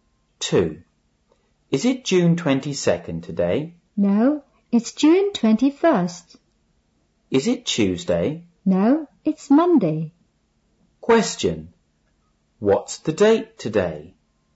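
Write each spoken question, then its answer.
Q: What's the date today?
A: June 21st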